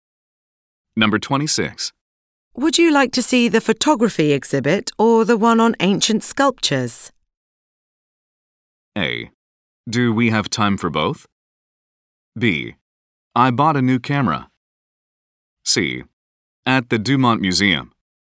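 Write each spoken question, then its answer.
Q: Would you like to see the photography exhibit or the one on ancient sculptures?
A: A: Do we have time for both?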